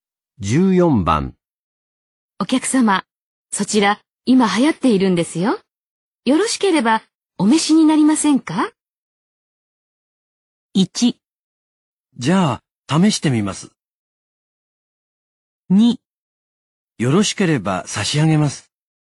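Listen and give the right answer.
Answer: 1: じゃあ、試してみます。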